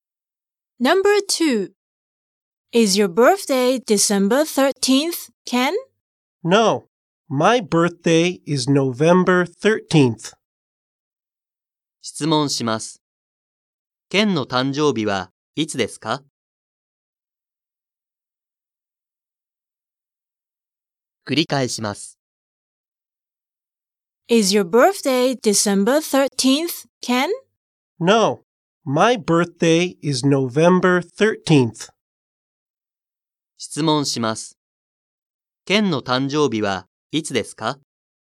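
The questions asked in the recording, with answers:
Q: Ken の誕生日はいつですか?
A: 11月13日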